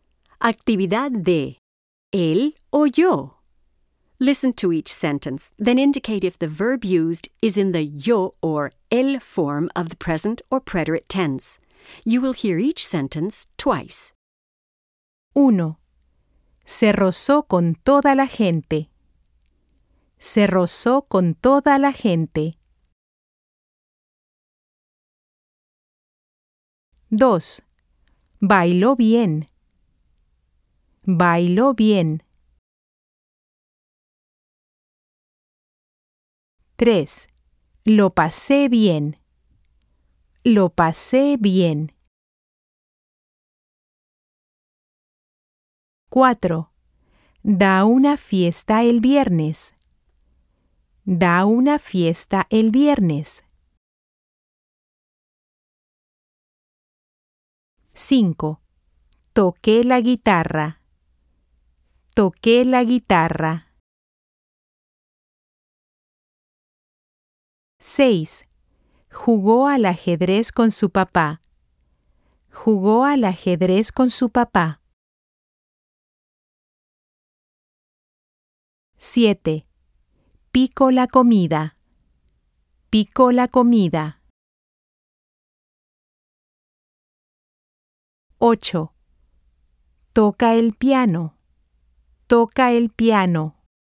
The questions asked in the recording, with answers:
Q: Se rozó con toda la gente.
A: El, pretérito.

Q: Lo pasé bien.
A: Yo, pretérito.

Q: Da una fiesta el viernes.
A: Él, presente.

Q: Toqué la guitarra.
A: Yo, pretérito.

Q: Jugó al ajedrez con su papá.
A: Él, pretérito.

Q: Toca el piano.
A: Él, presente.